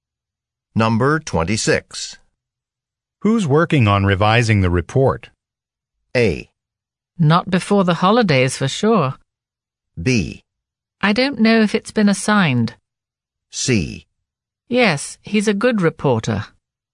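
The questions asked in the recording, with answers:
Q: Who's working on revising the report?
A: B: I don't know if it's been assigned.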